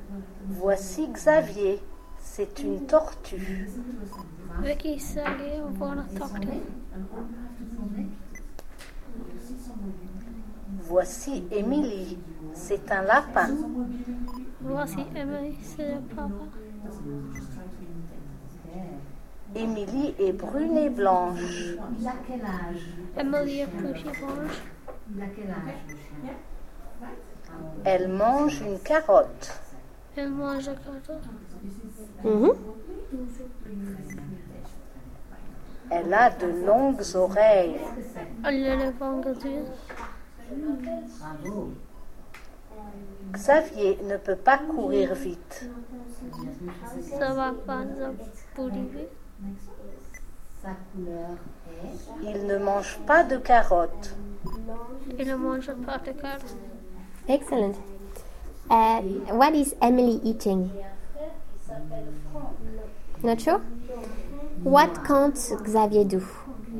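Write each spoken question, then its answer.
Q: What is Emily eating?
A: A carrot

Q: What can't Xavier do?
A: Run fast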